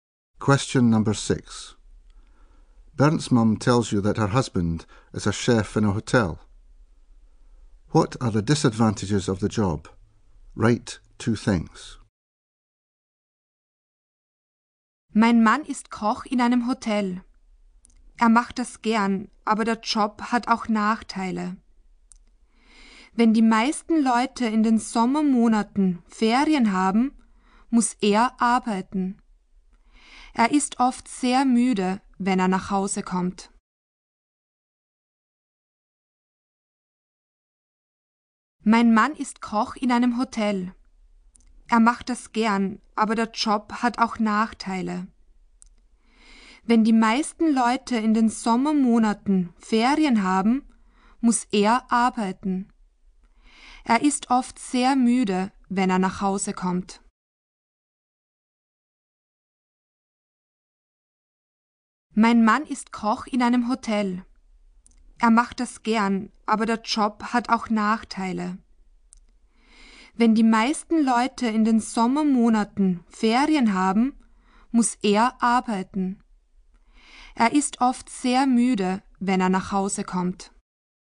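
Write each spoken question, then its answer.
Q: What are the disadvantages of the job?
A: He has to work in summer when most people are on holiday; he is often very tired when he comes home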